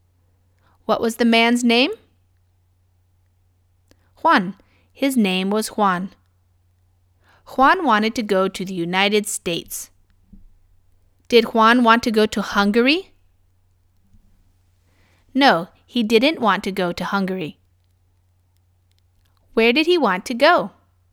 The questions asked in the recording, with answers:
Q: Where did he want to go?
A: The United States. He wanted to go to the United States.